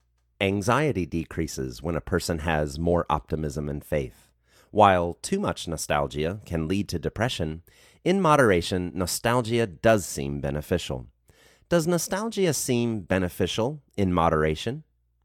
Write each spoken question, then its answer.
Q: Does nostalgia seem beneficial in moderation?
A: Yes, nostalgia seems beneficial in moderation.